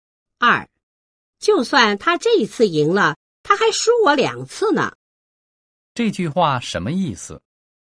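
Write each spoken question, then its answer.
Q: 这句话什么意思?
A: 即使这次他赢了,总的来说我还是比他多赢两次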